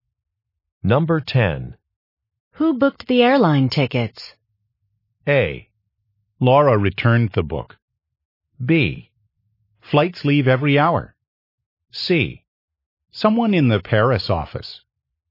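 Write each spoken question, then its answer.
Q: Who booked the airline tickets?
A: C: Someone in the Paris office.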